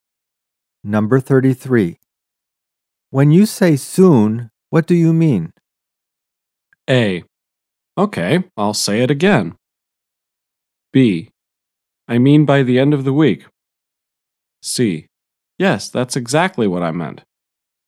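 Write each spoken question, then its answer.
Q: When you say soon, what do you mean?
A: B: I mean by the end of the week.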